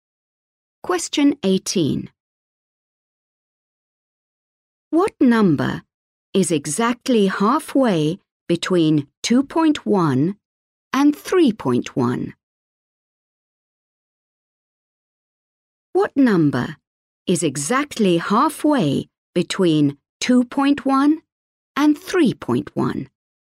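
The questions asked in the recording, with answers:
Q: What number is exactly halfway between 2.1 and 3.1?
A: 2.6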